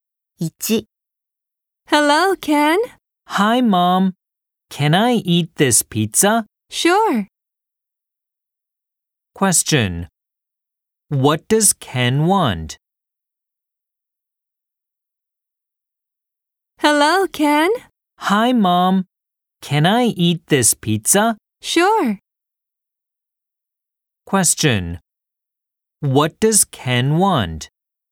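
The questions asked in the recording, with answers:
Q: What does Ken want?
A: To eat the pizza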